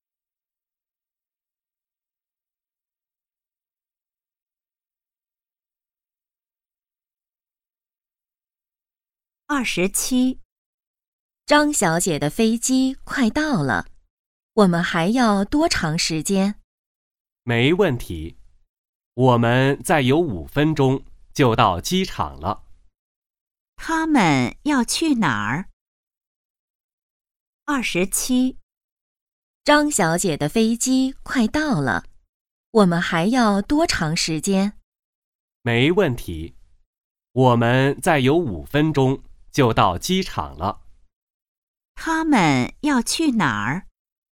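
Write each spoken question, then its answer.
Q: 他们要去哪儿?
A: 机场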